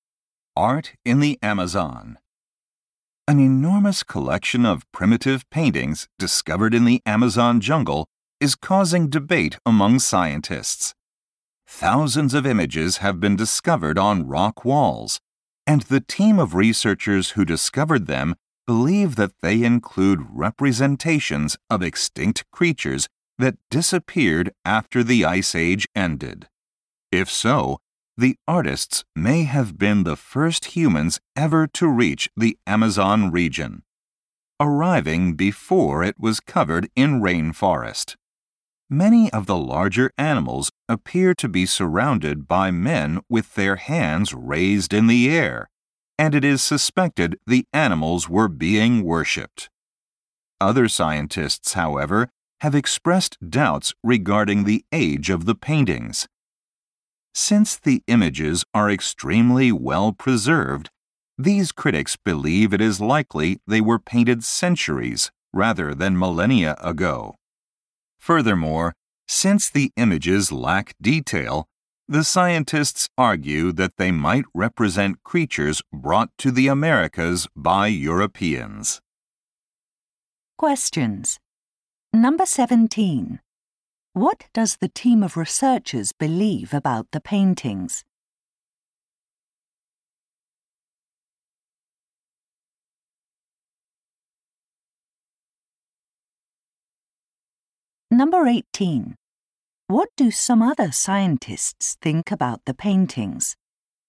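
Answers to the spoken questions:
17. Some show extinct creatures from the Ice Age, possibly painted by the first humans in the Amazon
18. They may be only centuries old, not millennia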